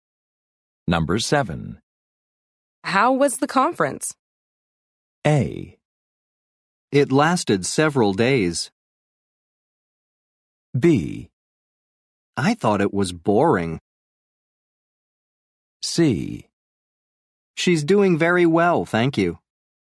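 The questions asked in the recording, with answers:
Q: How was the conference?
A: B: I thought it was boring.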